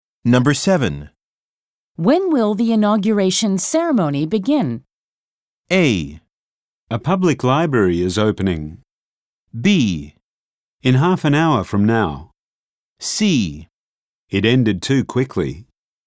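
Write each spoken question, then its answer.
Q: When will the inauguration ceremony begin?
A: B: In half an hour from now.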